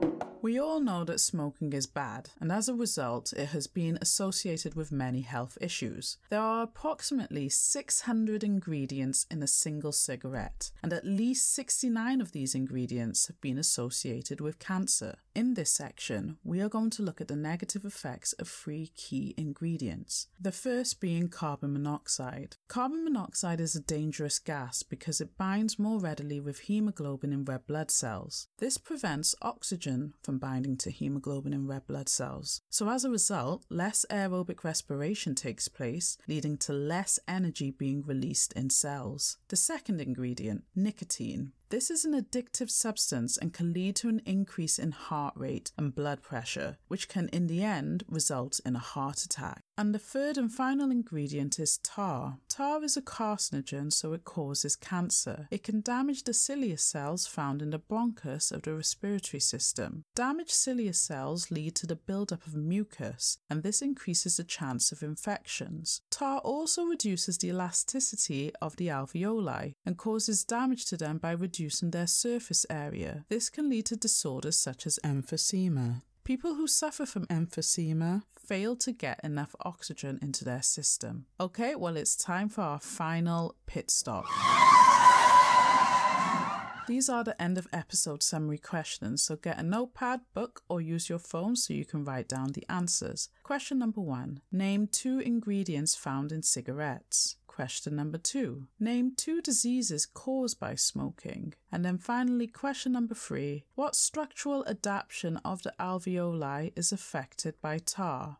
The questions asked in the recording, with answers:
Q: Question number one Name two ingredients found in cigarettes.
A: If you named any two out of the possible three which were carbon monoxide, tar, and nicotine, that would have given you those marks.

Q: Question number two Name two diseases caused by smoking.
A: For this you could have put emphysema and cancer.

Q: And then finally, question number three What structural adaptation of the alveoli is affected by tar?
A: It is the surface area and it is reduced by tar.